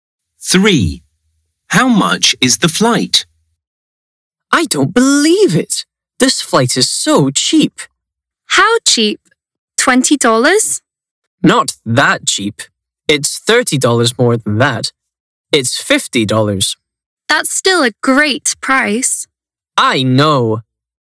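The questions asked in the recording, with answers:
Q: How much is the flight?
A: $50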